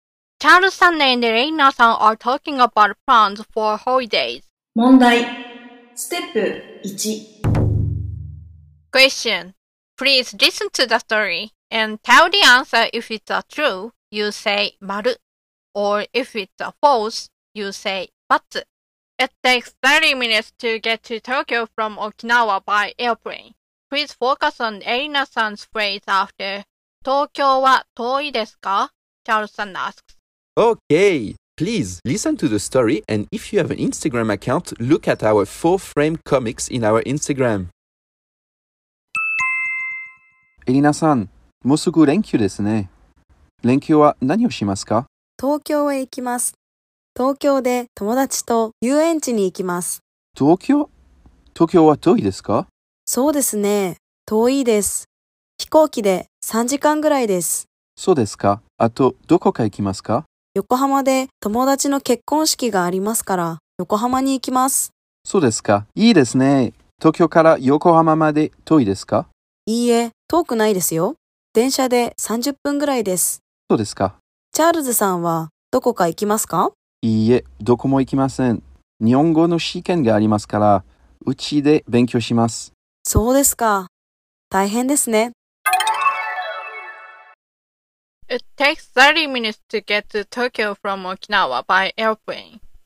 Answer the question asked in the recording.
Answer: So the answer is バツ